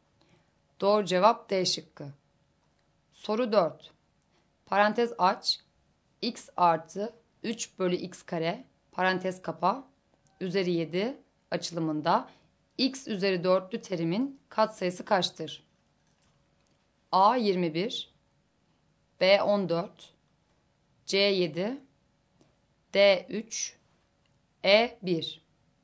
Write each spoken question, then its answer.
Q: Parantez aç, x artı 3 bölü x kare parantez kapa üzeri 7 açılımında x üzeri 4'lü terimin katsayısı kaçtır?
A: Doğru cevap A şıkkı.